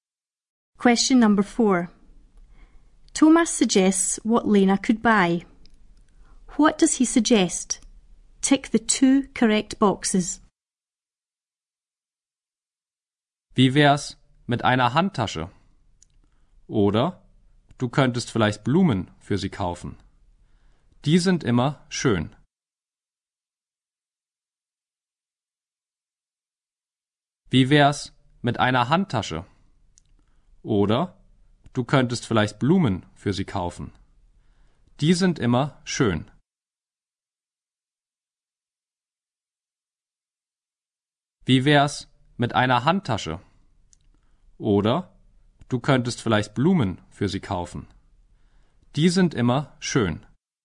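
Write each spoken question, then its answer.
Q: What does he suggest?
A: A handbag or flowers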